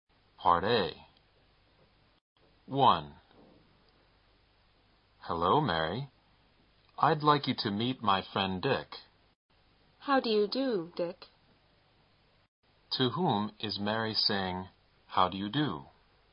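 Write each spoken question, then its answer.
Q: To whom is Mary saying, how do you do?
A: Dick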